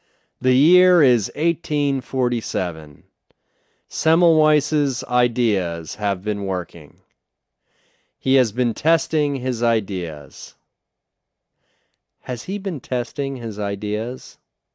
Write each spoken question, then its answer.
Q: Has he been testing his ideas?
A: Yes, he has been testing his ideas.